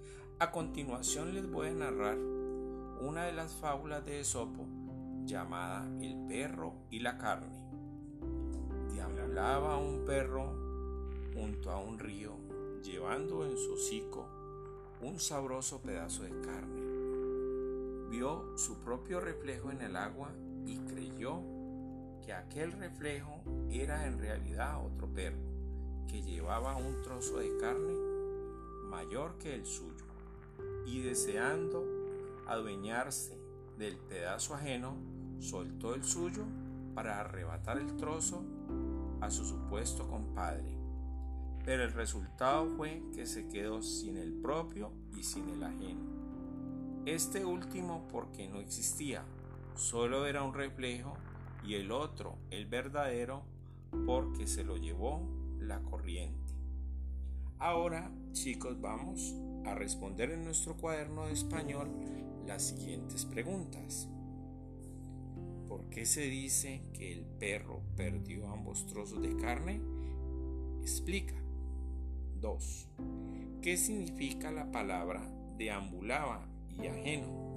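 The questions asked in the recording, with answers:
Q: ¿Por qué se dice que el perro perdió ambos trozos de carne?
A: Porque el otro trozo era solo un reflejo que no existía y el suyo se lo llevó la corriente al soltarlo.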